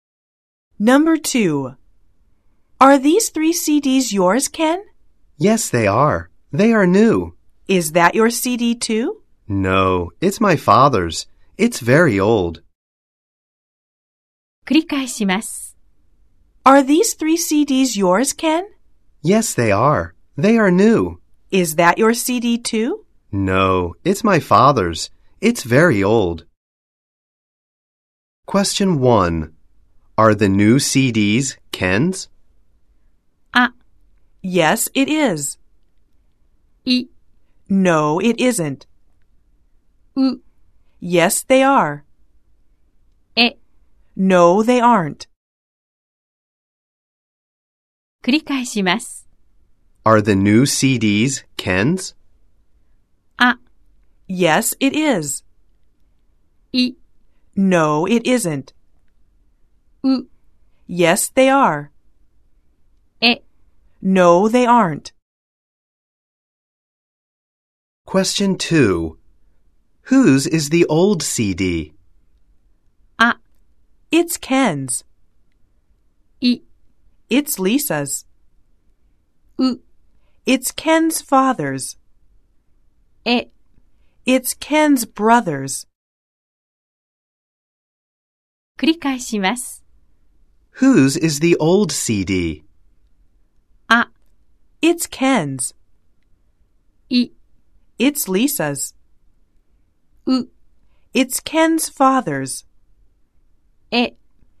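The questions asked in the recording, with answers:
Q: Are the new CDs Ken's?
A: う: Yes, they are.

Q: Whose is the old CD?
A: う: It's Ken's father's.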